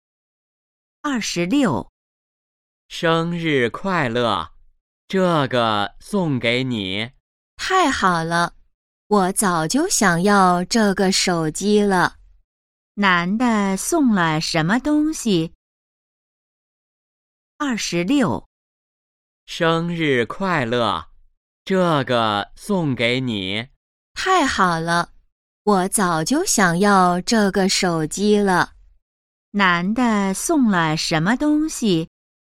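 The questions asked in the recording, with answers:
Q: 男的送了什么东西?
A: 手机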